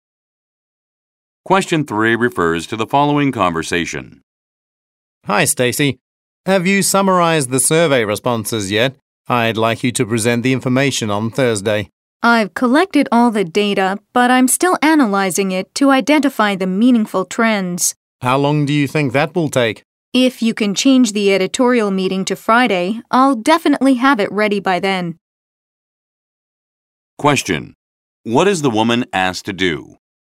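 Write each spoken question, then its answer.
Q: What is the woman asked to do?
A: Present survey results on Thursday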